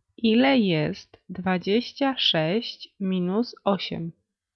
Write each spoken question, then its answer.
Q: Ile jest 26 minus 8?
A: 18.